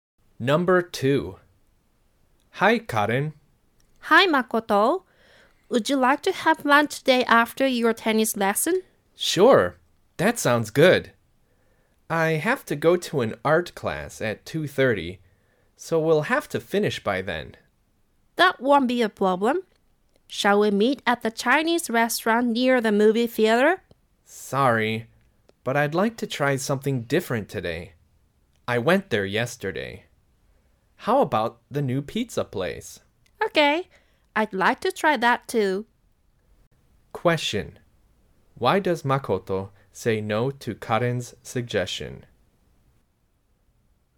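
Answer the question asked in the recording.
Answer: Because he went to the Chinese restaurant yesterday.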